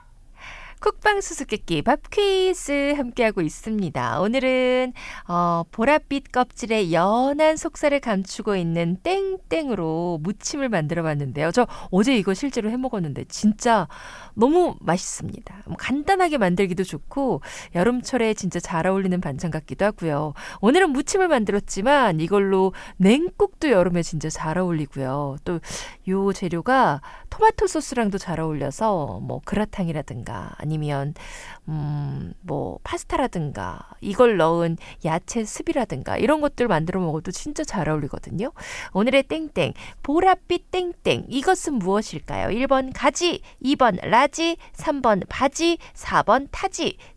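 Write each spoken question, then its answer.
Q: 오늘의 땡땡 보랏빛 땡땡 이것은 무엇일까요? 1번 가지, 2번 라지, 3번 바지, 4번 타지.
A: 1: 가지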